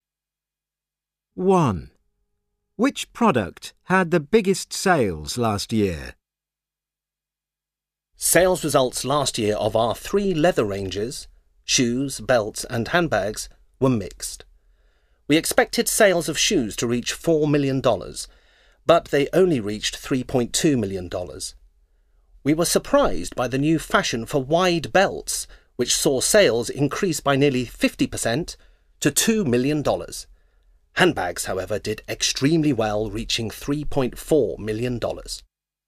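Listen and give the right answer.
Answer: Handbags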